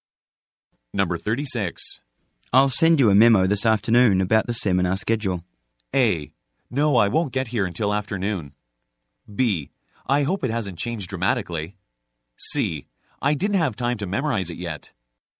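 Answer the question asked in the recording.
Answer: B: I hope it hasn't changed dramatically.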